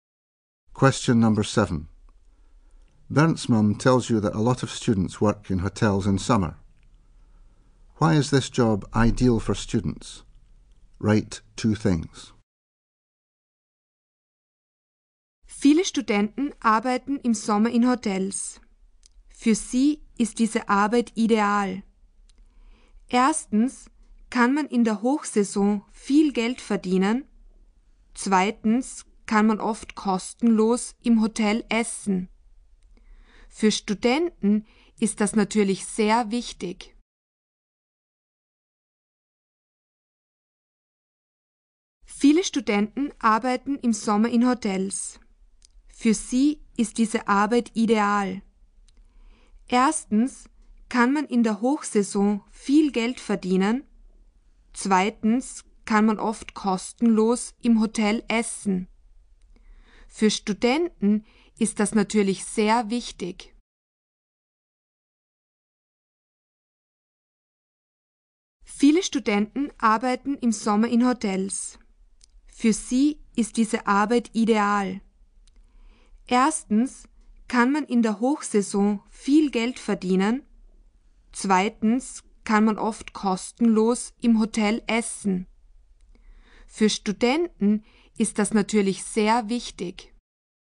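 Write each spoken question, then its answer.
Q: Why is this job ideal for students?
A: You can earn a lot of money in high season; you can often eat for free in the hotel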